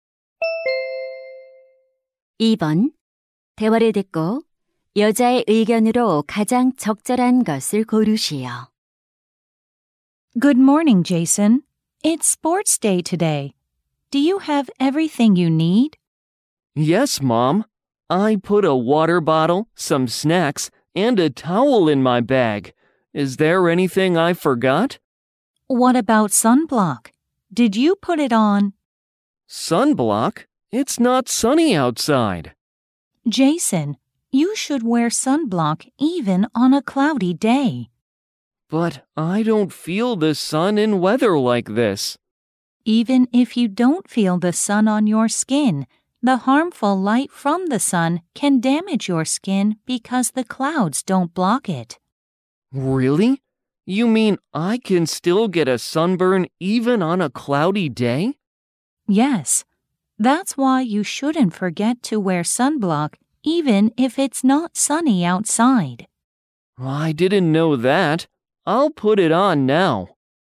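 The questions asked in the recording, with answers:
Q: 대화를 듣고 여자의 의견으로 가장 적절한 것을 고르시오.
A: 흐린 날에도 자외선 차단제를 발라야 한다.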